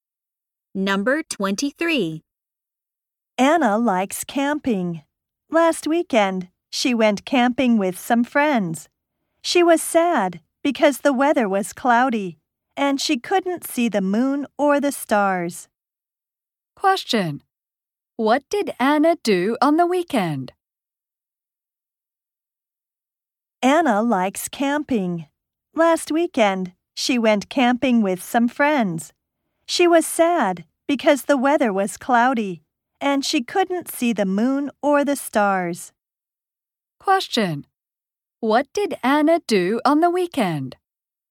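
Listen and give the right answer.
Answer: She went camping with friends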